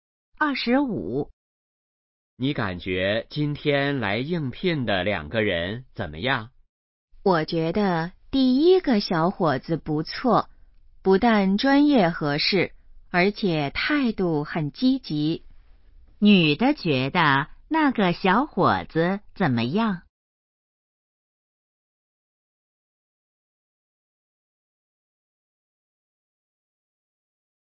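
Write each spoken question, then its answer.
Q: 女的觉得那个小伙子怎么样?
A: 不错,专业合适,态度积极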